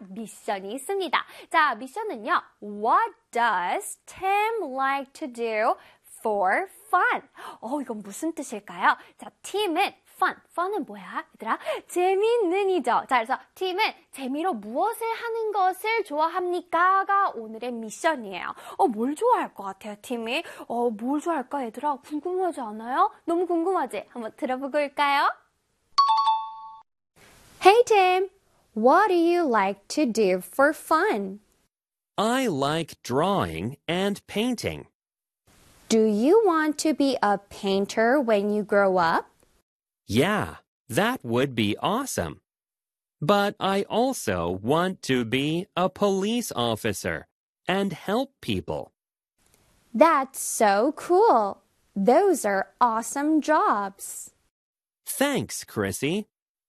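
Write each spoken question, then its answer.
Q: What does Tim like to do?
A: He likes drawing and painting.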